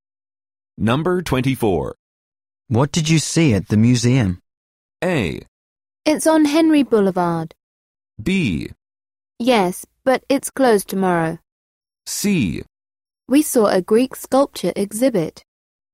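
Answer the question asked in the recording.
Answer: C: We saw a Greek sculpture exhibit.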